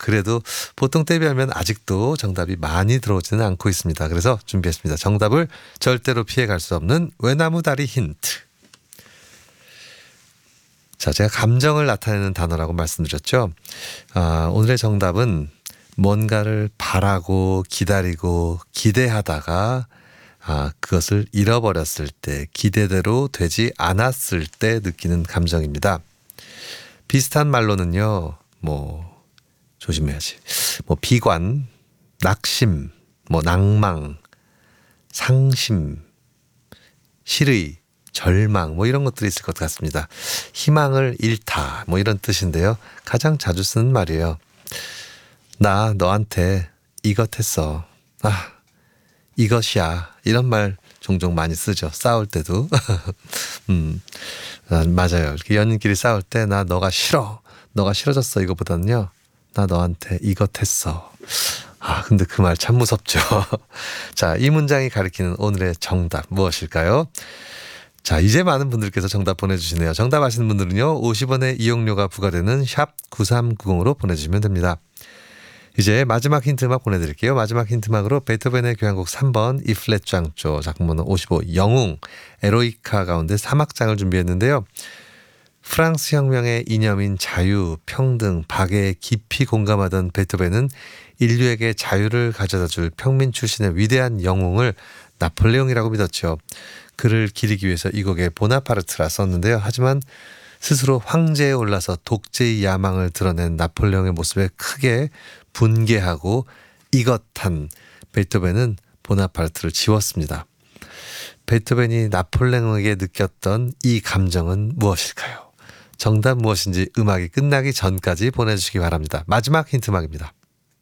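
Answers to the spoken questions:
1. 실망
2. 실망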